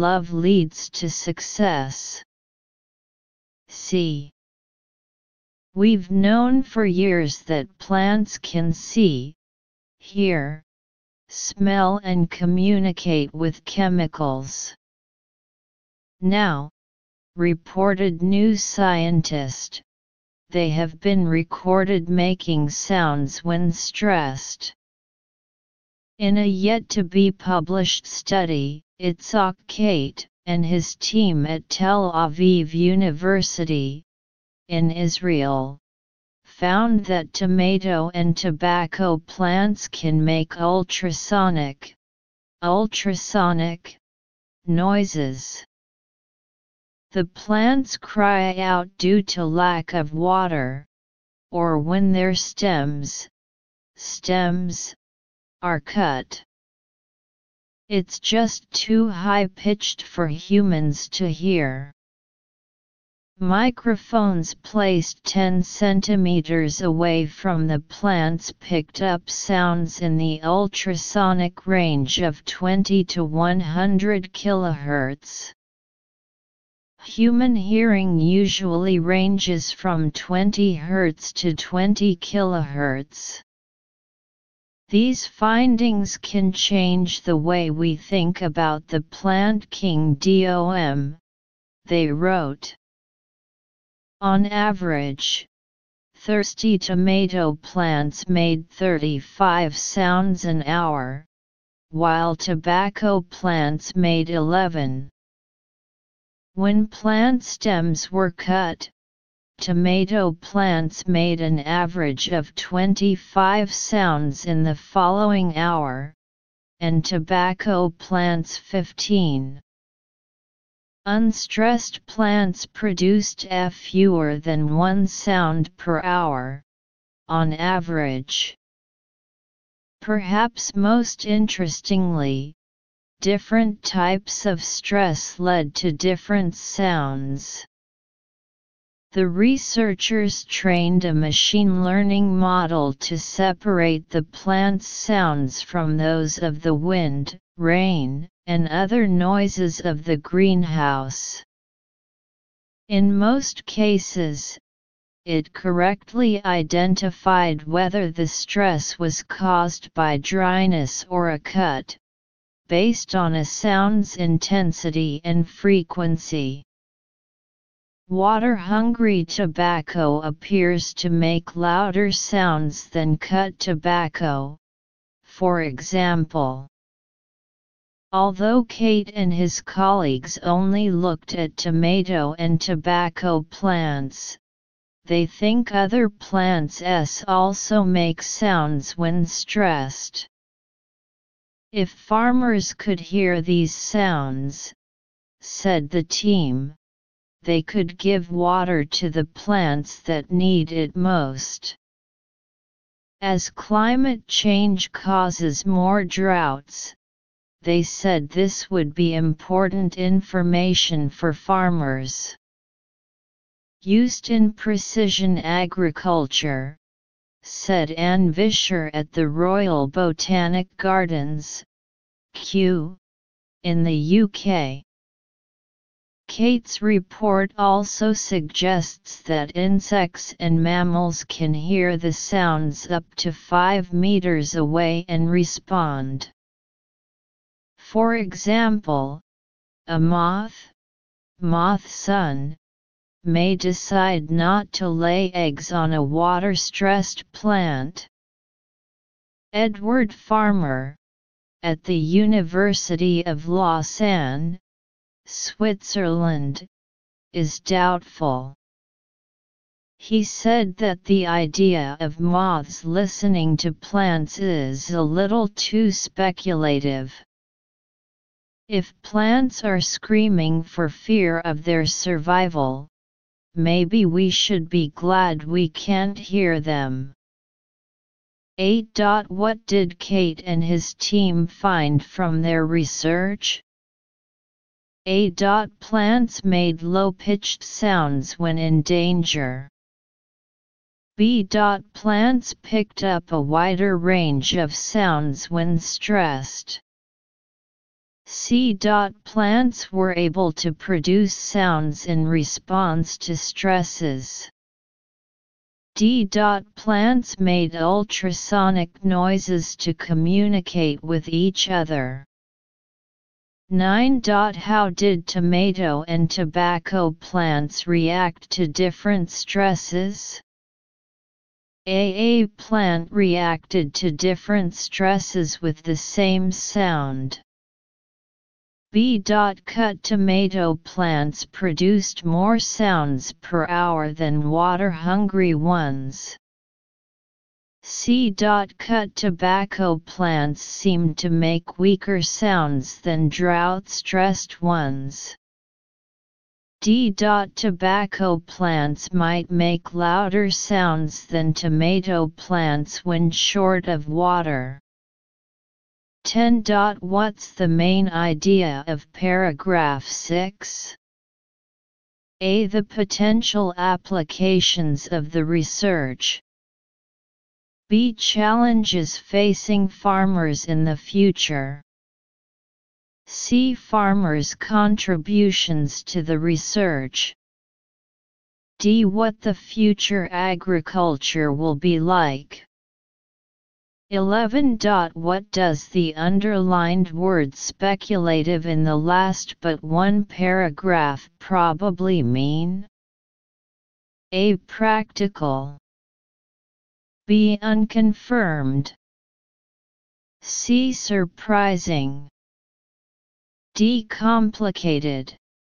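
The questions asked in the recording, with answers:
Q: What did Kate and his team find from their research?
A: C: Plants were able to produce sounds in response to stresses.

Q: How did tomato and tobacco plants react to different stresses?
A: C: Cut tobacco plants seemed to make weaker sounds than drought-stressed ones.

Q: What does the underlined word speculative in the last but one paragraph probably mean?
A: B: Unconfirmed.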